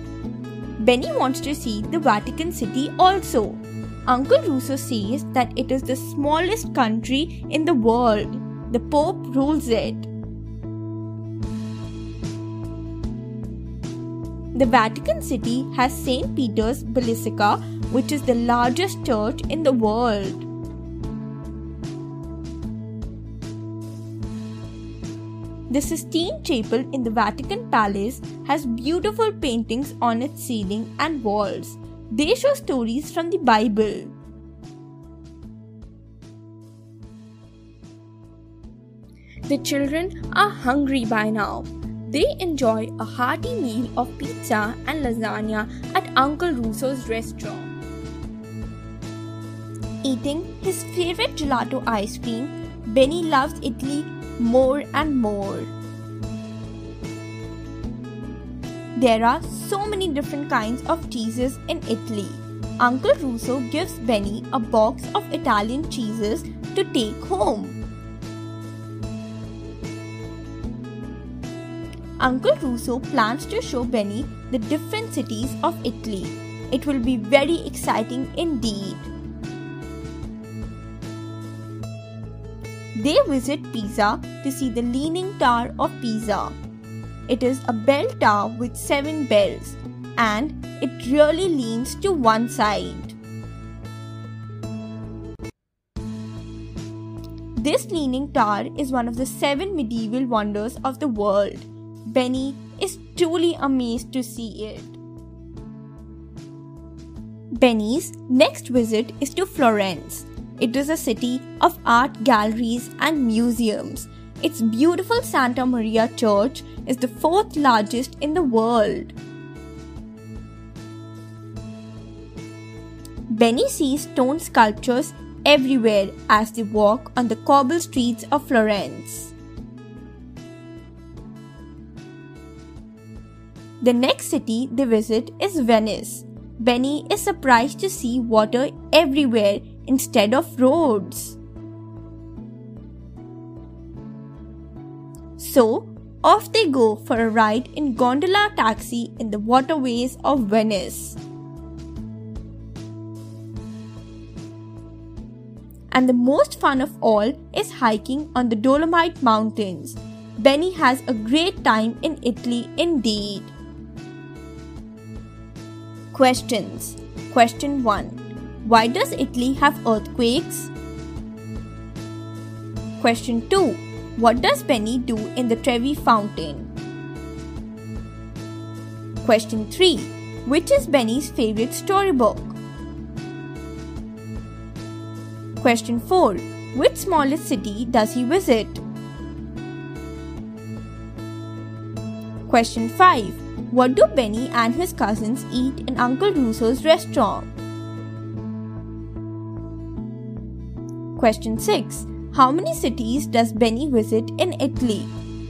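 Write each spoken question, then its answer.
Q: Which smallest city does he visit?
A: Vatican City

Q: What do Benny and his cousins eat in Uncle Russo's restaurant?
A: Pizza and lasagna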